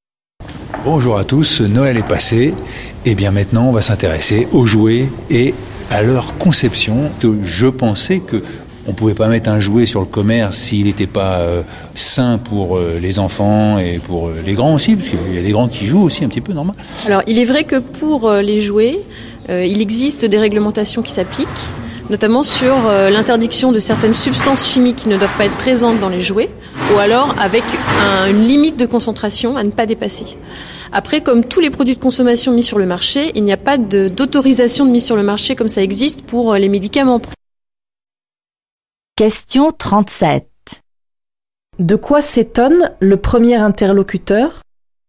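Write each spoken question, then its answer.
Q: De quoi s'étonne le premier interlocuteur ?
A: Que des jouets puissent être vendus sans être sains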